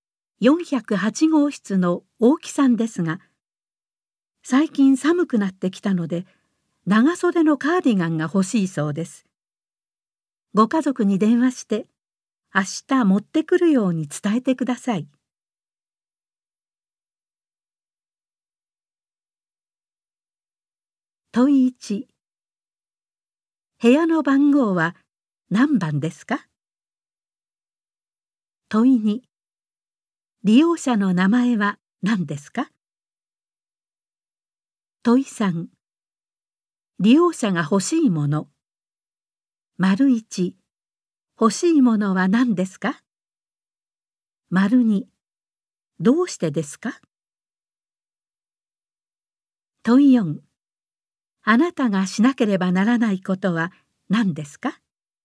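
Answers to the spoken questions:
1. 10408号室
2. 大木さん
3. 長袖のカーディガン
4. 最近寒くなってきたから
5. 家族に電話して明日カーディガンを持ってくるように伝える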